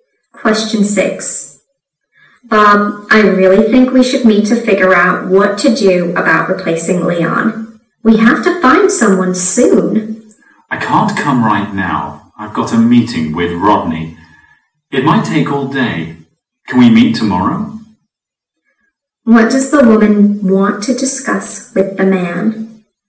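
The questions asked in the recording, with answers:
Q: What does the woman want to discuss with the man?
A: Finding someone to replace Leon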